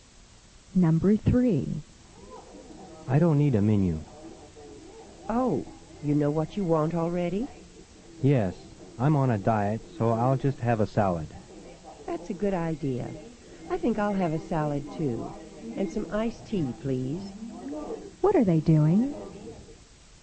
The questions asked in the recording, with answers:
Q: What are they doing?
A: Number 3 is C. They are ordering in a restaurant.